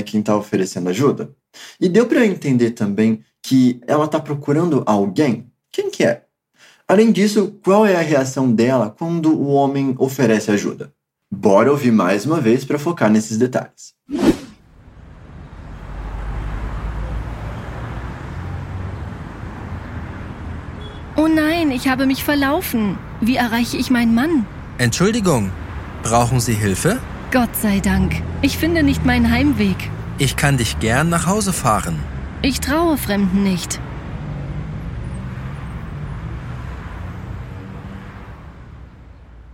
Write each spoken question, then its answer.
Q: E deu para entender também que ela está procurando alguém? Quem que é?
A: Ela tá perdida e tá procurando alguém.

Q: Além disso, qual é a reação dela quando o homem oferece ajuda?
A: E eu não confio em estranhos.